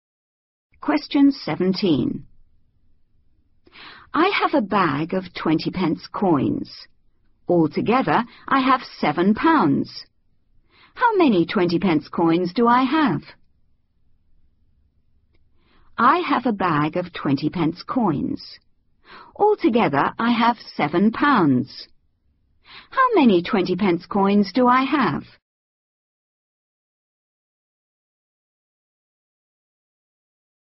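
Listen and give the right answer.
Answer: 35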